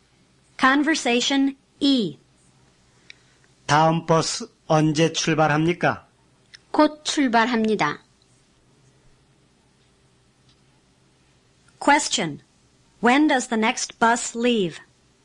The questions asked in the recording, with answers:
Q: When does the next bus leave?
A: It leaves right away.